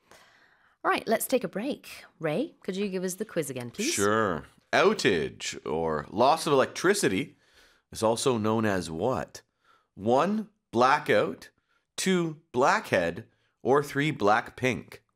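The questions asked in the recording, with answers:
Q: Outage or loss of electricity is also known as what?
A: 1: blackout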